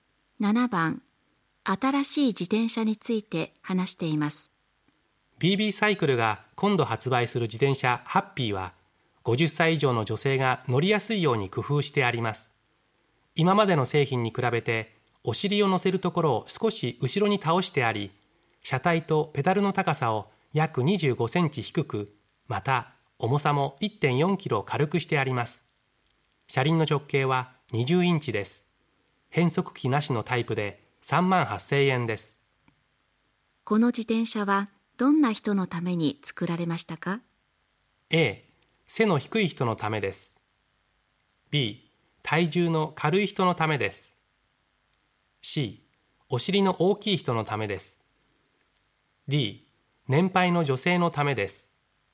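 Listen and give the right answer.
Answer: D: 年配の女性のためです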